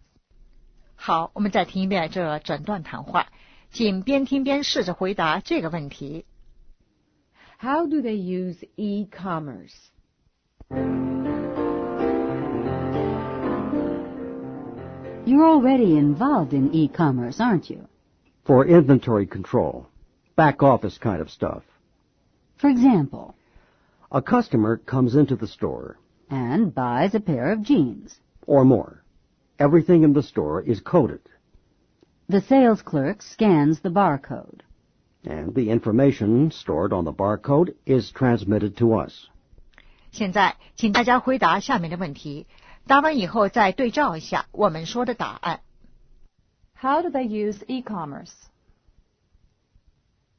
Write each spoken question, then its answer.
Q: How do they use e-commerce?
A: For inventory control.